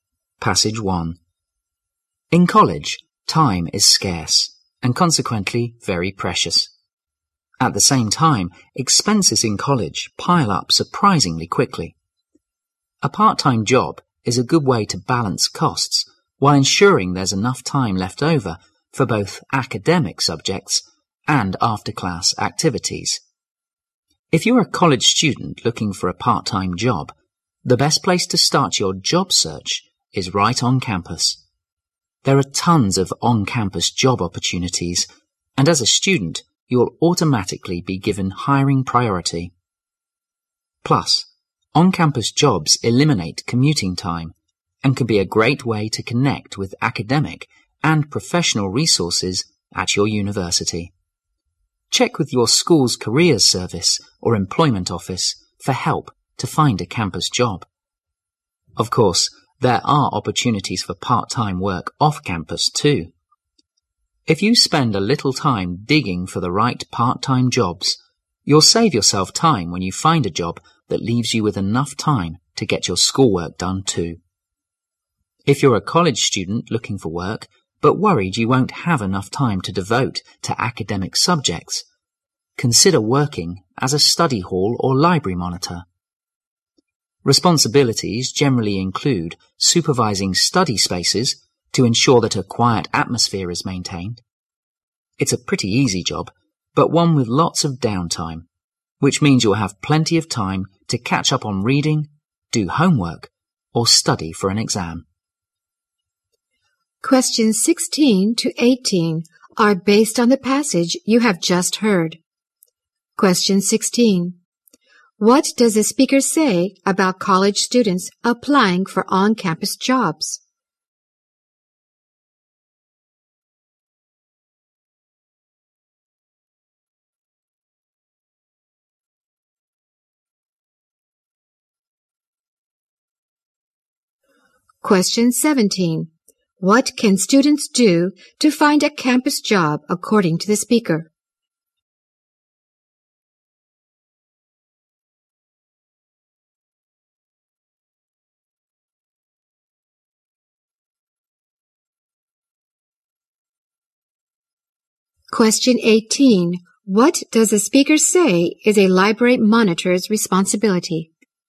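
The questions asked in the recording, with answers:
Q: What does the speaker say about college students applying for on-campus jobs?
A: They are given hiring priority

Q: What can students do to find a campus job according to the speaker?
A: Check with the school's careers service or employment office

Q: What does the speaker say is a library monitor's responsibility?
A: Supervising study spaces to keep them quiet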